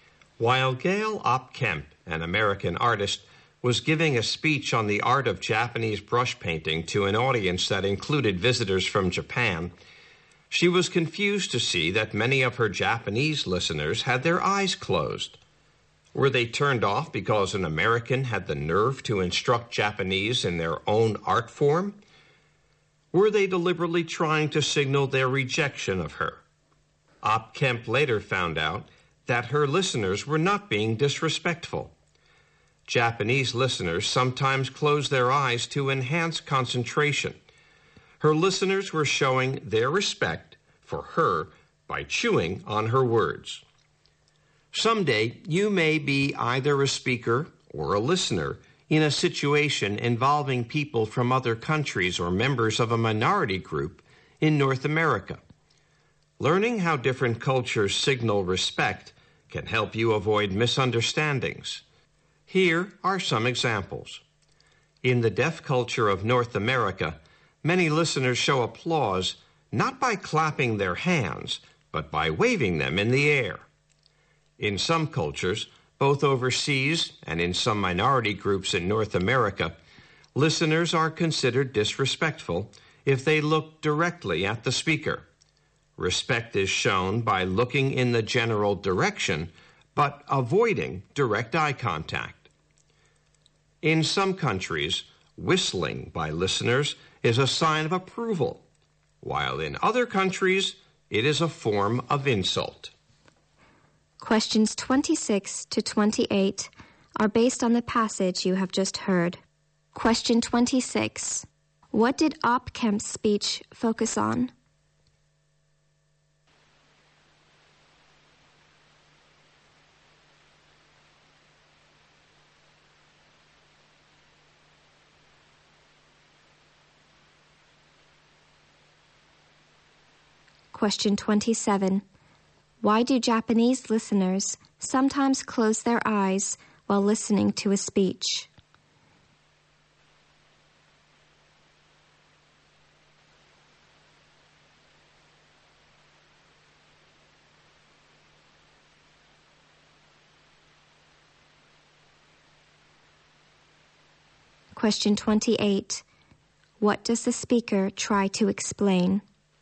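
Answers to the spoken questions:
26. The art of Japanese brush painting
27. To concentrate better
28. How different cultures show respect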